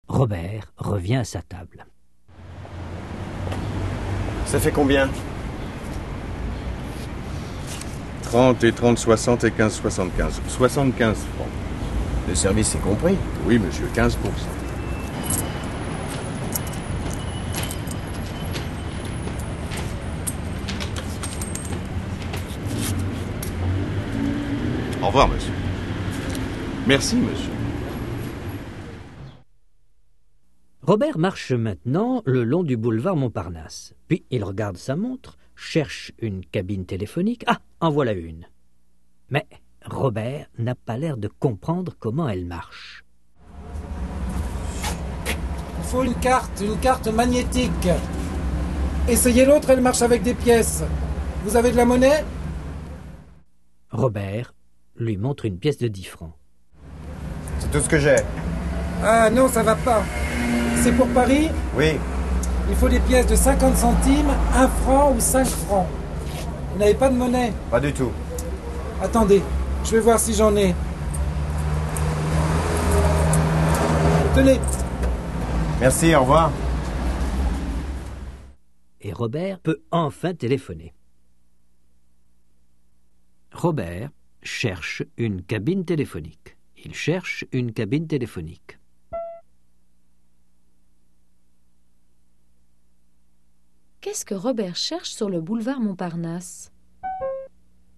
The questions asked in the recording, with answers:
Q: Qu'est-ce que Robert cherche sur le boulevard Montparnasse ?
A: Une cabine téléphonique.